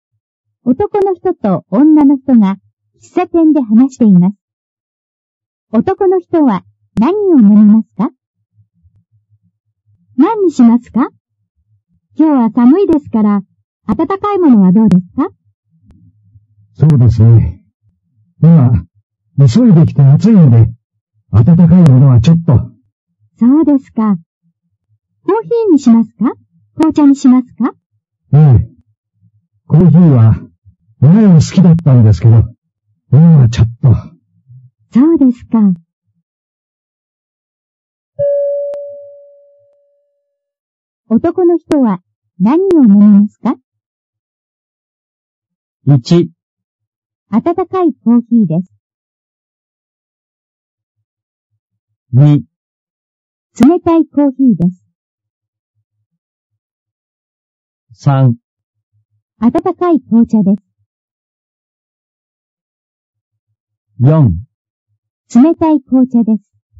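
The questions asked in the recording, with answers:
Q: 男の人は何を飲みますか?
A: 4: 冷たい紅茶です。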